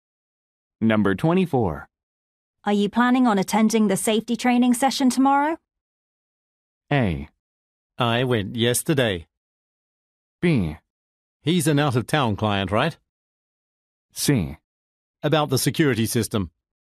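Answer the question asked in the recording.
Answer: A: I went yesterday.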